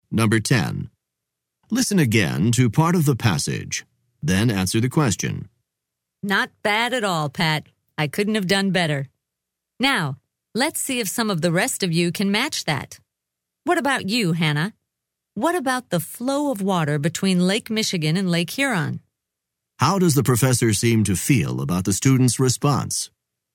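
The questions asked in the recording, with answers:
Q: How does the professor seem to feel about the student's response?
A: He is pleased and impressed; he thinks it was very good.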